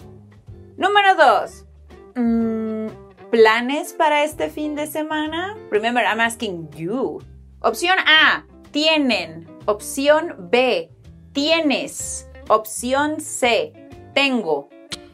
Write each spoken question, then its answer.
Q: ¿Planes para este fin de semana? Remember, I'm asking you. Opción A, tienen. Opción B, tienes. Opción C, tengo.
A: ¡Tienes!